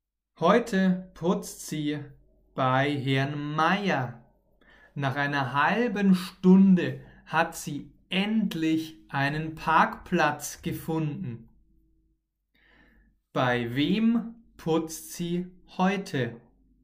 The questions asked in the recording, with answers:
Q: Bei wem putzt sie heute?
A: bei Herrn Meier. Sie putzt heute bei Herrn